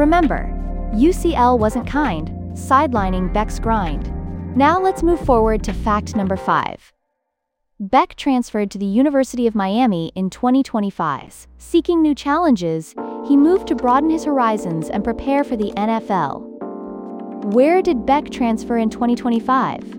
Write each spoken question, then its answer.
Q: Where did Beck transfer in 2025?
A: Correct answer, University of Miami.